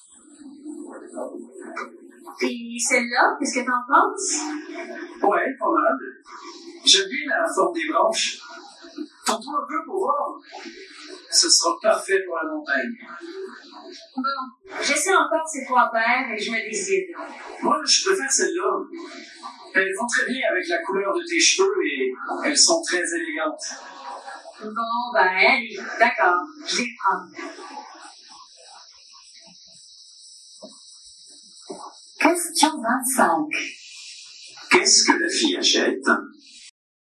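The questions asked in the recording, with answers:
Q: Qu'est-ce que la fille achète?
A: des lunettes de soleil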